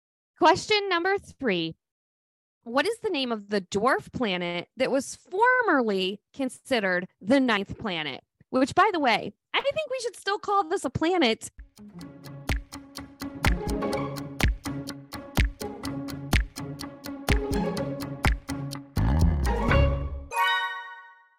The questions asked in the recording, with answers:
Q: What is the name of the dwarf planet that was formerly considered the ninth planet?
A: the answer to that is Pluto.